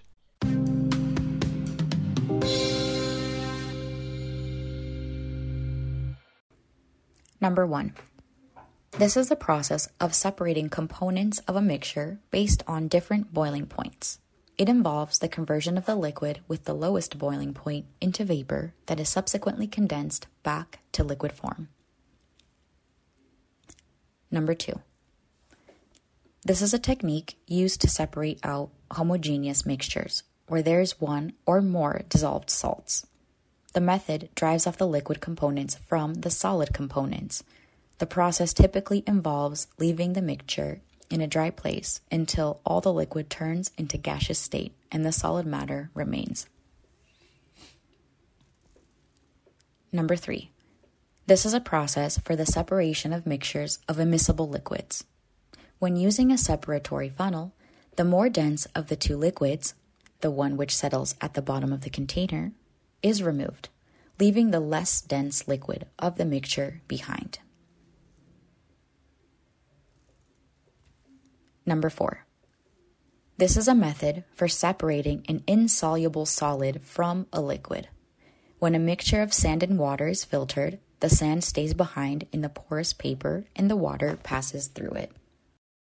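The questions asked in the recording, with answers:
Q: This is the process of separating components of a mixture based on different boiling points.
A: Distillation

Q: This is a technique used to separate out homogeneous mixtures where there is one or more dissolved salts.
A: Evaporation

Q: This is a method for separating an insoluble solid from a liquid.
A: Filtration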